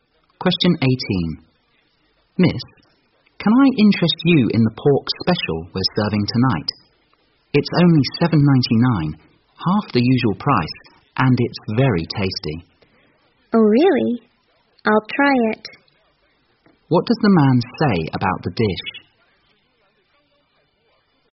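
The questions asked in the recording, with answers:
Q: What does the man say about the dish?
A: It's half the usual price ($7.99) and very tasty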